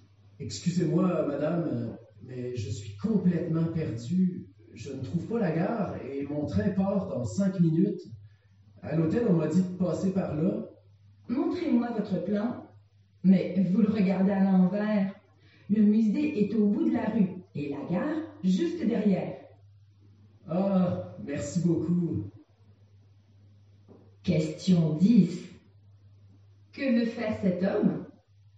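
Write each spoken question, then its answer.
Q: Que veut faire cet homme?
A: Aller à la gare pour prendre son train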